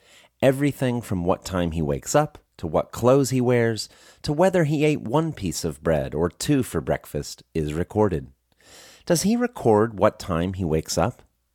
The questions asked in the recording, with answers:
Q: Does he record what time he wakes up?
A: Yes, he records what time he wakes up.